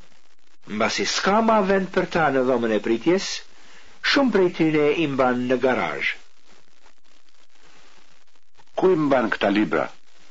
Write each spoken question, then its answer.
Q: Kuj mban këta libra?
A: Këta libra imban në dhomën e pritjes dhe në garazh.